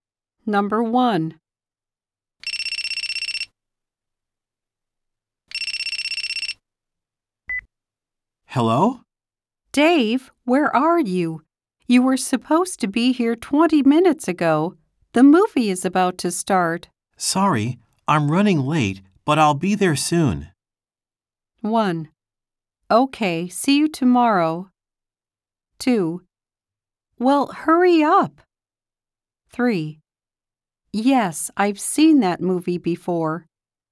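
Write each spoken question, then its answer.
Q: Sorry, I'm running late, but I'll be there soon.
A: 2: Well, hurry up.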